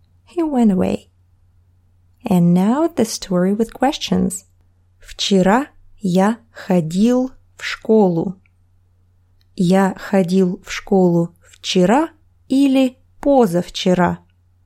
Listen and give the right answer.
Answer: Вчера. Вчера я ходил в школу.